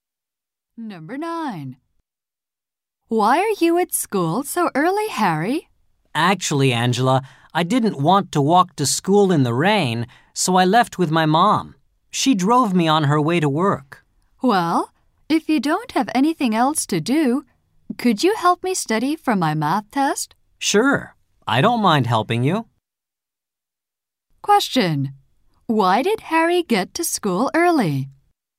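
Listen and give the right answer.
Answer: His mother drove him because of the rain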